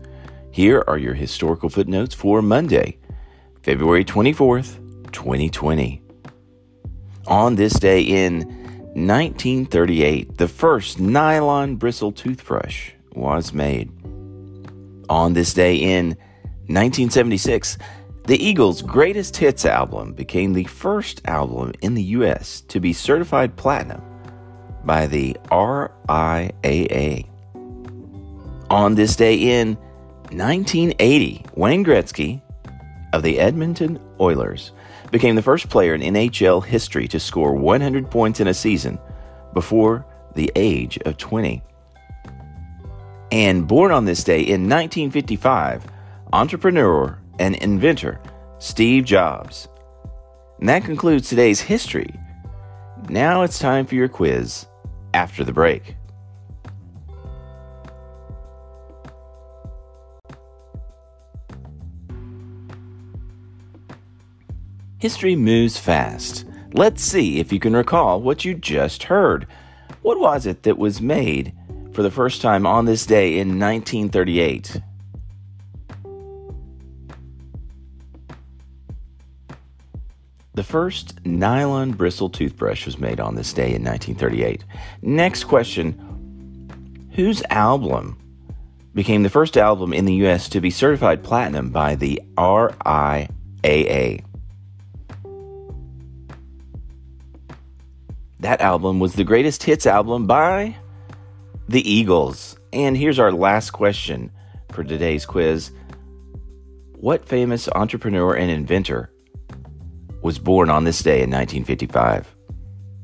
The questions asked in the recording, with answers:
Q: What was it that was made for the first time on this day in 1938?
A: The first nylon bristle toothbrush was made on this day in 1938.